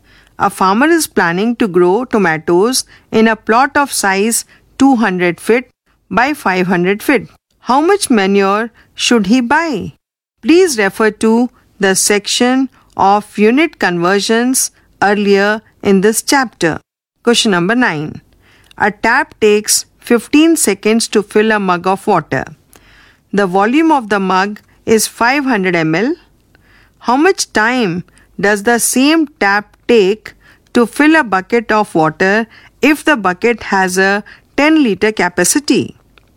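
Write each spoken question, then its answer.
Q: How much time does the same tap take to fill a bucket of water if the bucket has a 10 liter capacity?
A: 300 seconds (5 minutes)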